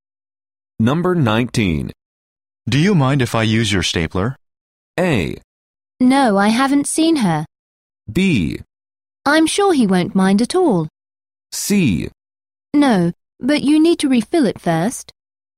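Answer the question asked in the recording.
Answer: C: No, but you need to refill it first.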